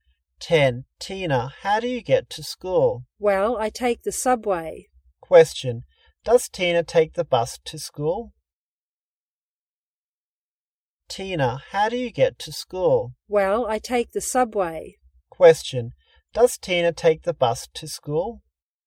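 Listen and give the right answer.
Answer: No, she takes the subway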